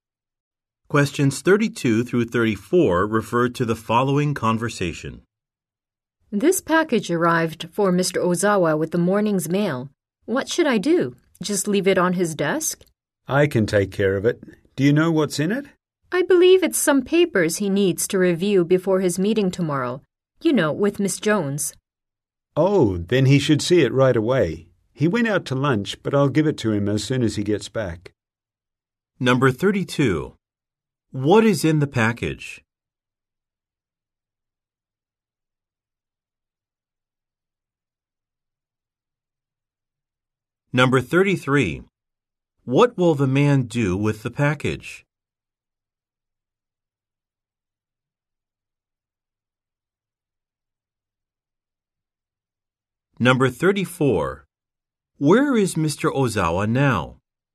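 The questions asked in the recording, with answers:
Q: What is in the package?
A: Papers to review before his meeting

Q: What will the man do with the package?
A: Give it to Mr. Ozawa when he returns

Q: Where is Mr. Ozawa now?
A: Out to lunch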